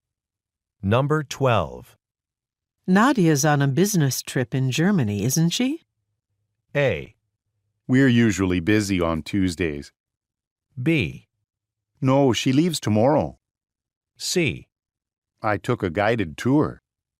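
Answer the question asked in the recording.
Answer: B: No, she leaves tomorrow.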